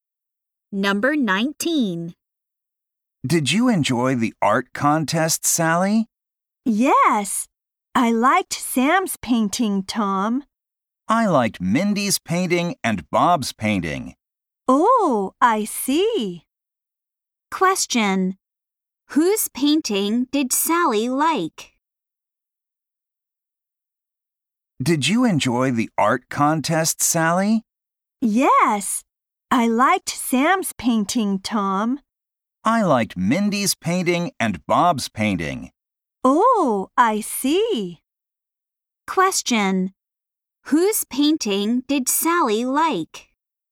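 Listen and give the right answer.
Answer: Sam's.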